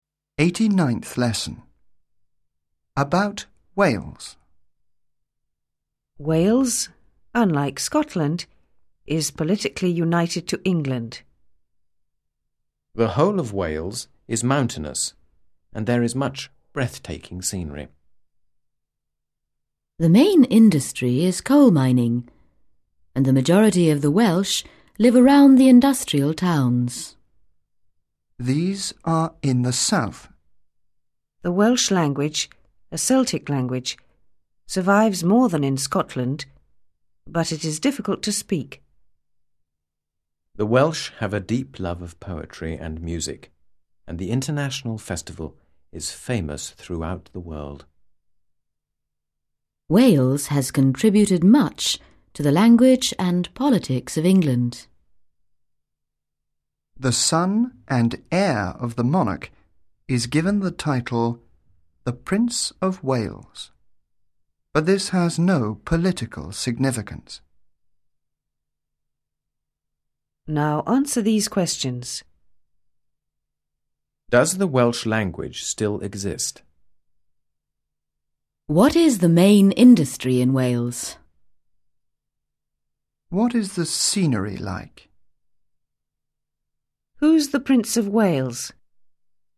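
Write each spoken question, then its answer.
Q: Does the Welsh language still exist?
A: Yes, it survives more than in Scotland.

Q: What is the main industry in Wales?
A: Coal mining

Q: What is the scenery like?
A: Mountainous and breathtaking

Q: Who's the Prince of Wales?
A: The son and heir of the monarch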